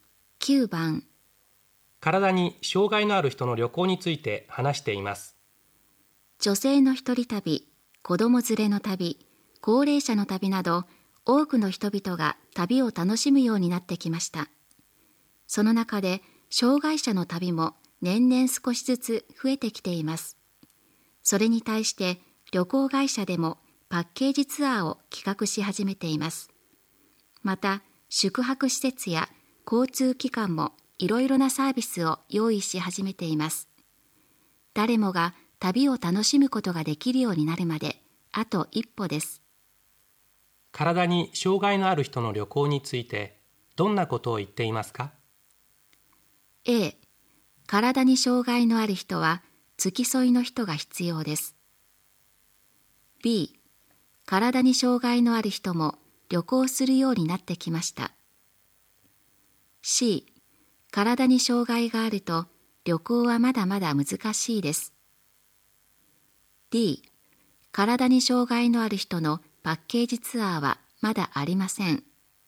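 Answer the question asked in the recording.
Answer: B: 体に障害のある人も旅行するようになってきました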